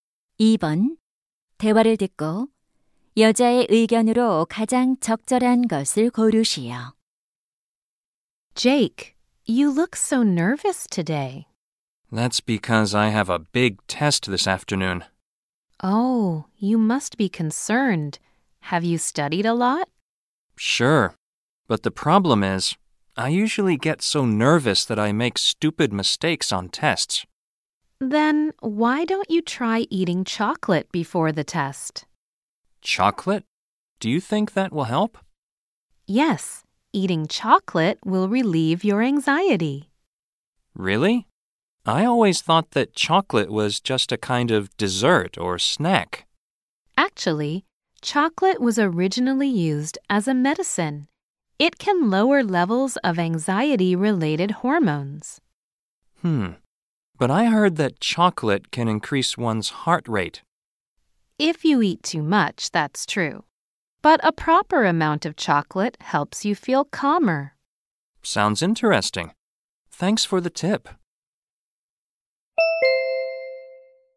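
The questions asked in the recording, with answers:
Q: 대화를 듣고 여자의 의견으로 가장 적절한 것을 고르시오.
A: 적당량의 초콜릿을 먹으면 불안 완화에 도움이 된다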